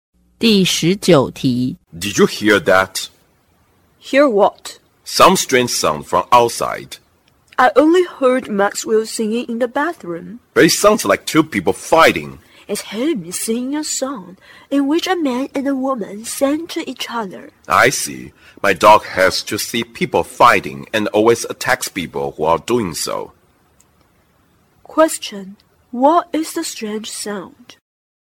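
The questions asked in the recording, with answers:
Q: what is the strange sound?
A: Maxwell singing a duet song in the bathroom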